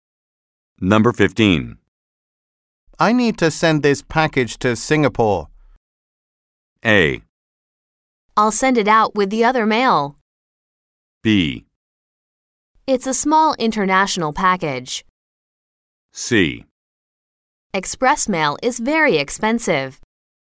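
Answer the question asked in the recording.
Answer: A: I'll send it out with the other mail.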